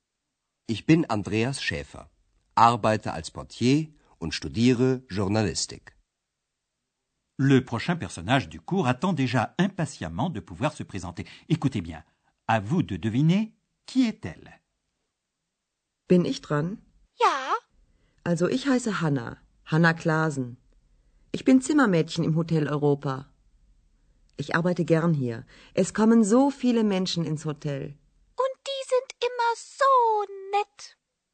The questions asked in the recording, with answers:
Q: à vous de deviner qui est-elle.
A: C'était Hanna Klasen. Elle est femme de chambre à l'Hôtel Europa.